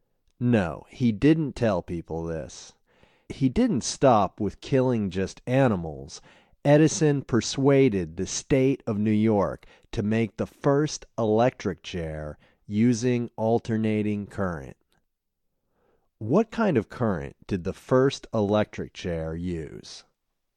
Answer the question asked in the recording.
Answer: The first electric chair used alternating current.